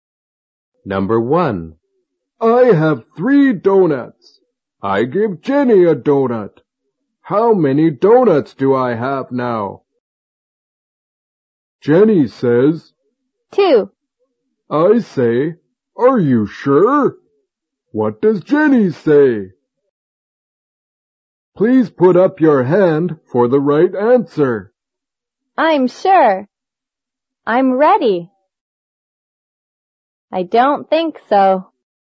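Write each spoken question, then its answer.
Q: What does Jenny say?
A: I'm sure.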